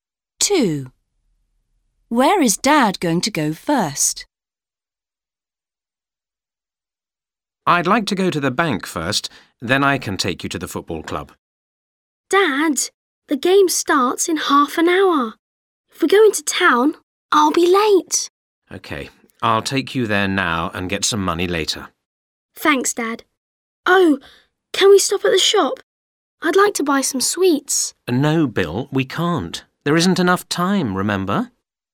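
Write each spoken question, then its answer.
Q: Where is Dad going to go first?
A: To the football club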